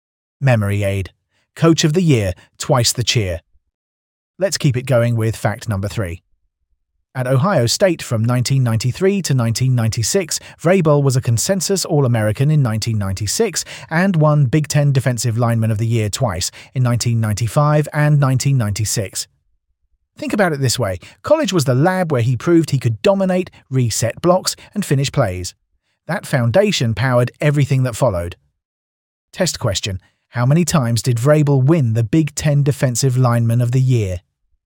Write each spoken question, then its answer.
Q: How many times did Vrabel win the Big Ten Defensive Lineman of the Year?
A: Correct answer. Twice.